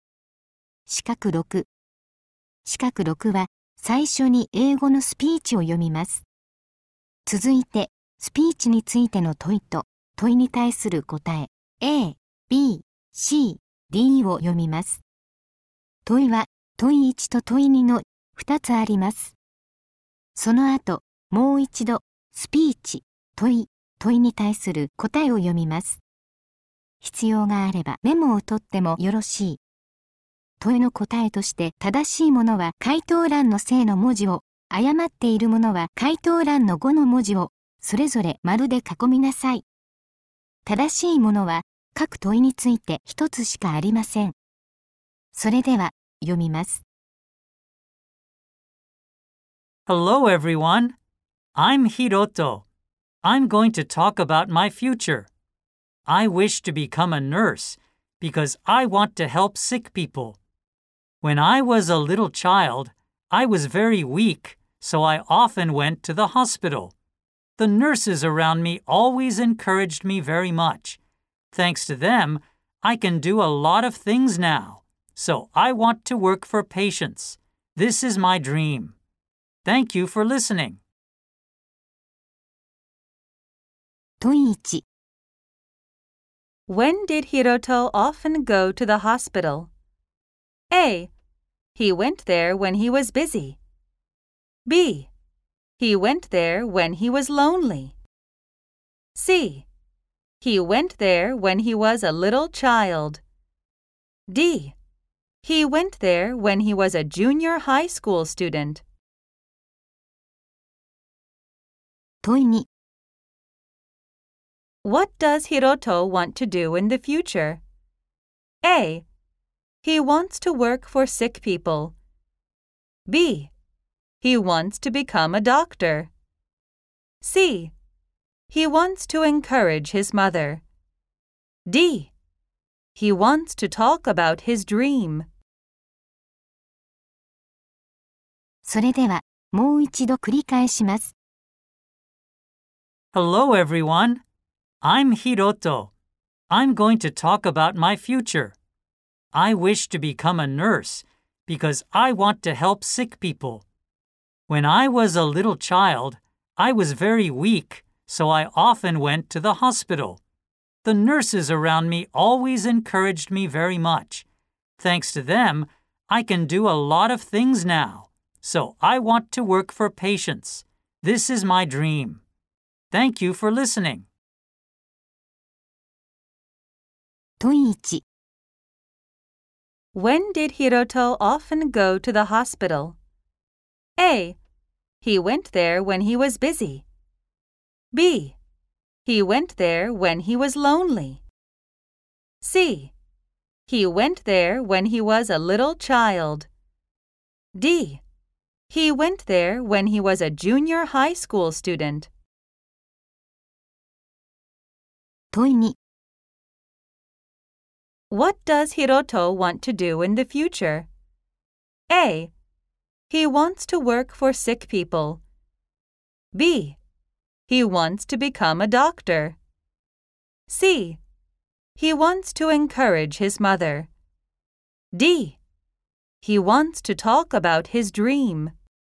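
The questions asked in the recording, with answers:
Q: When did Hiroto often go to the hospital?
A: C: He went there when he was a little child.

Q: What does Hiroto want to do in the future?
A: A: He wants to work for sick people.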